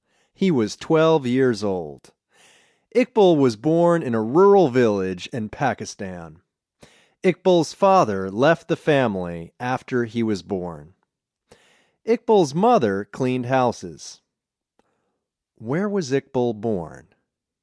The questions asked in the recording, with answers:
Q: Where was Iqbal born?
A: Iqbal was born in a rural village in Pakistan.